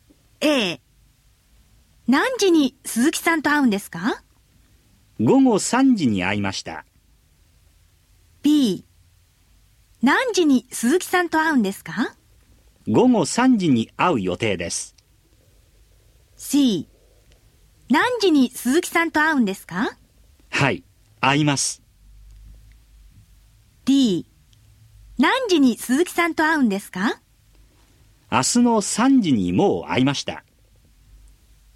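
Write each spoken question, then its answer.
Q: 何時に鈴木さんと会うんですか?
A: B: 午後3時に会う予定です。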